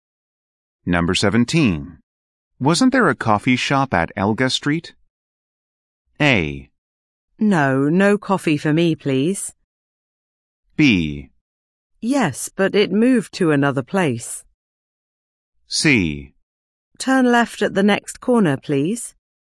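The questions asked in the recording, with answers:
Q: Wasn't there a coffee shop at Elga Street?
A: B: Yes, but it moved to another place.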